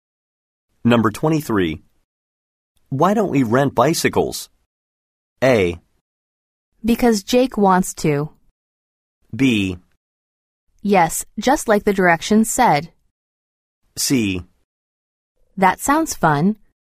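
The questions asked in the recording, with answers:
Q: Why don't we rent bicycles?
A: C: That sounds fun.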